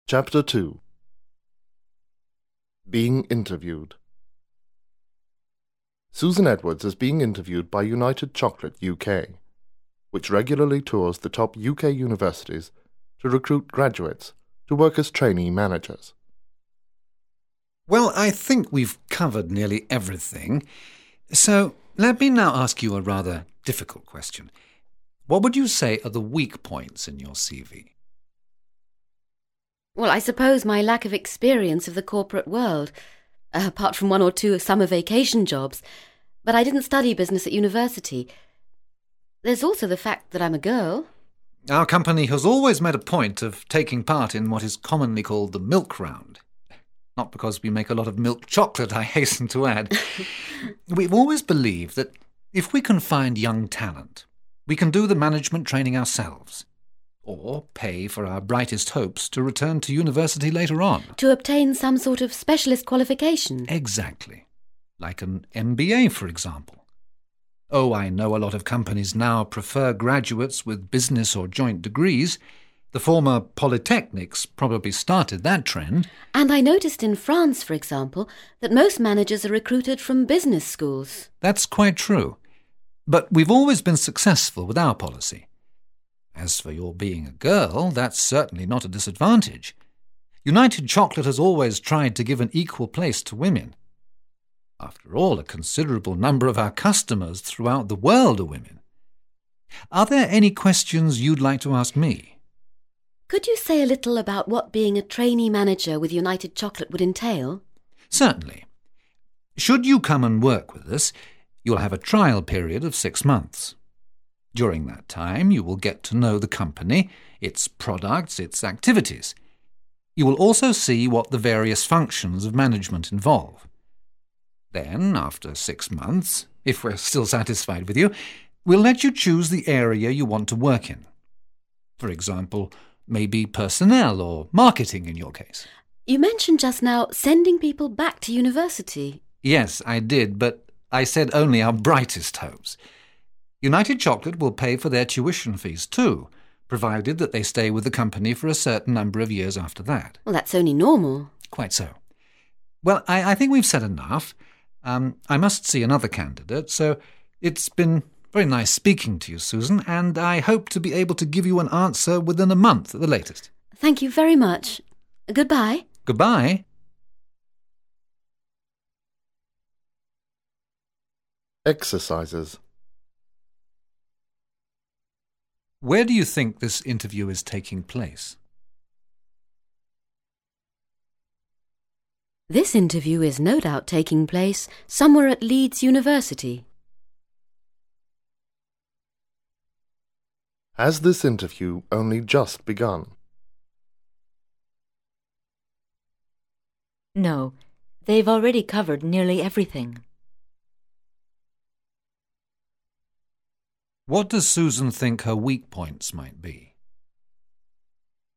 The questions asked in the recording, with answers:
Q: What does Susan think her weak points might be?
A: She thinks her weak points might be her lack of experience of the corporate world and the fact that she's a girl.